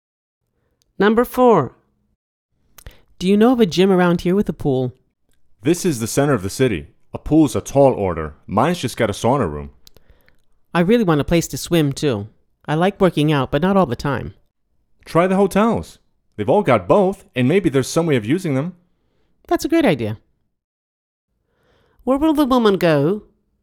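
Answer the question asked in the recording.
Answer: To a hotel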